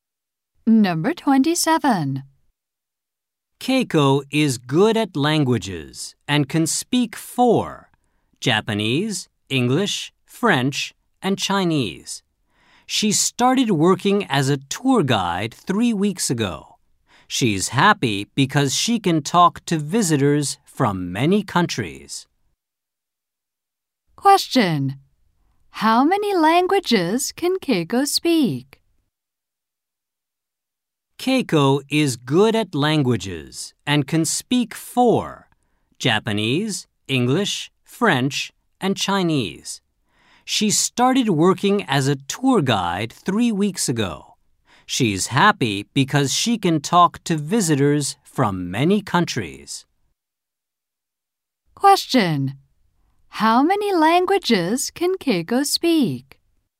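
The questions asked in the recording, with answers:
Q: How many languages can Keiko speak?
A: Four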